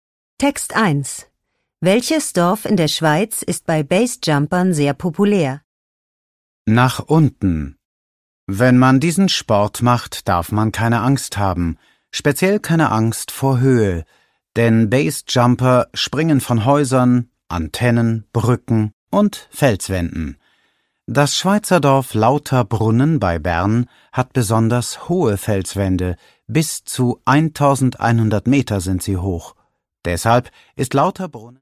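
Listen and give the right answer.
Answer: Lauterbrunnen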